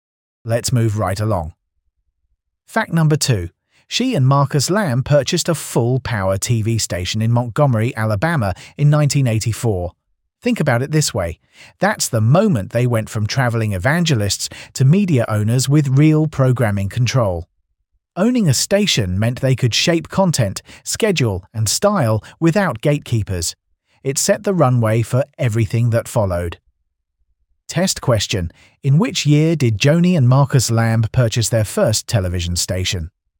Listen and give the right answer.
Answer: Correct answer, 1984.